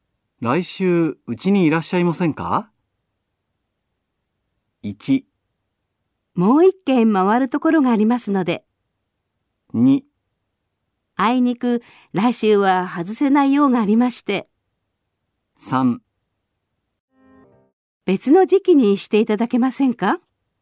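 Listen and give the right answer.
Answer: 2: あいにく、来週は外せない用がありまして。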